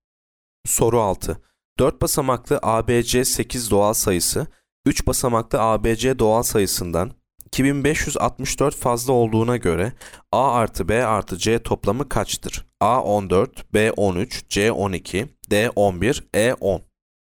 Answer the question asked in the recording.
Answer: Yanıt A 14.